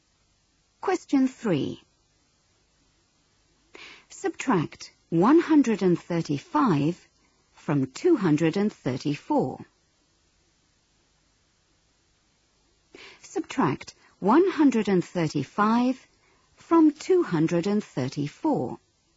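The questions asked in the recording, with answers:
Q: Subtract 135 from 234.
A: 99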